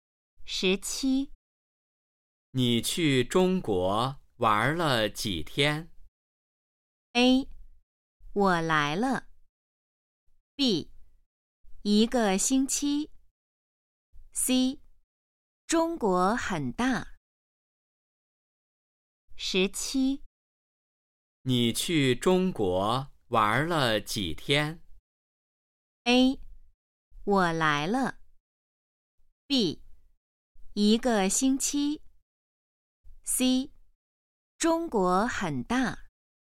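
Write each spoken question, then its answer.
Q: 你去中国玩了几天?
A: B: 一个星期。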